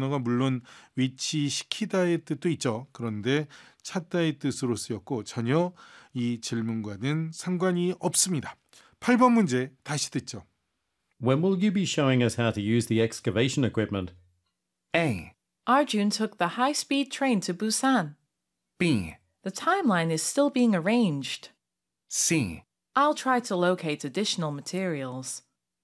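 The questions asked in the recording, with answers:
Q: When will you be showing us how to use the excavation equipment?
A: B: The timeline is still being arranged.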